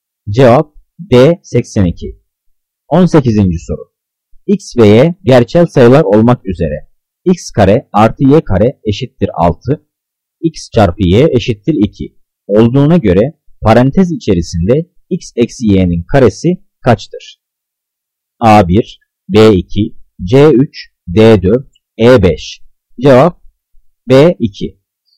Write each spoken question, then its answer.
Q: X ve Y gerçel sayılar olmak üzere X kare artı Y kare eşittir 6, X çarpı Y eşittir 2 olduğuna göre parantez içerisinde X eksi Y'nin karesi kaçtır?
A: Cevap B2.